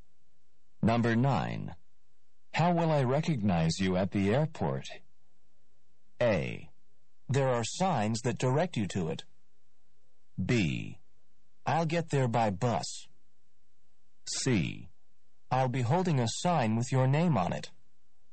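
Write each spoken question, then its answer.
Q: How will I recognize you at the airport?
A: C: I'll be holding a sign with your name on it.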